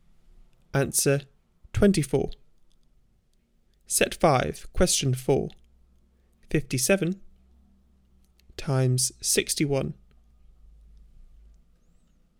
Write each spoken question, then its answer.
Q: 57 times 61.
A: Answer 3477.